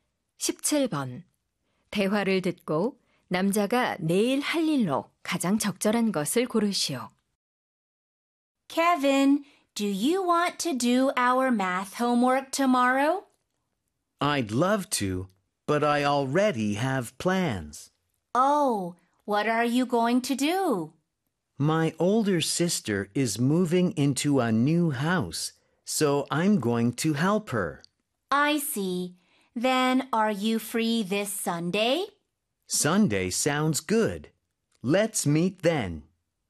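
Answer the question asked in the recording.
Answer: 누나의 이사 돕기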